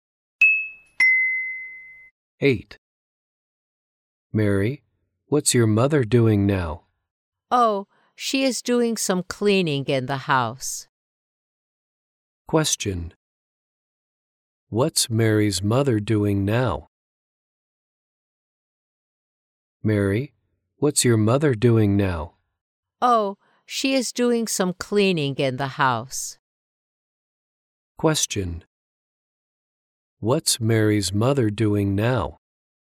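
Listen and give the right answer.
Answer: She is doing some cleaning in the house.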